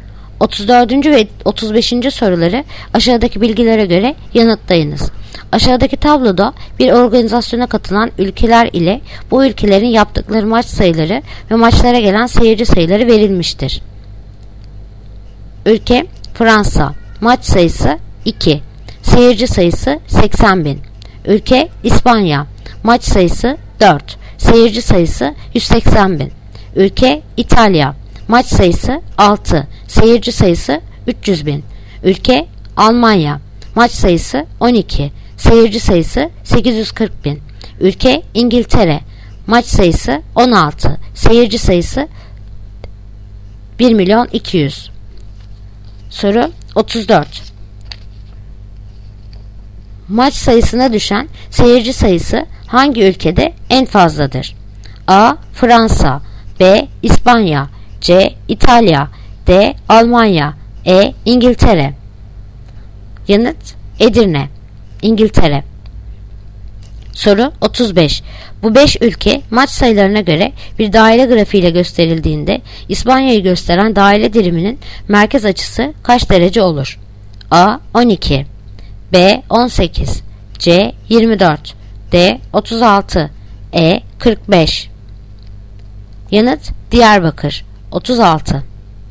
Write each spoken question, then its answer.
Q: maç sayısına düşen seyirci sayısı hangi ülkede en fazladır?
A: Yanıt: Edirne, İngiltere.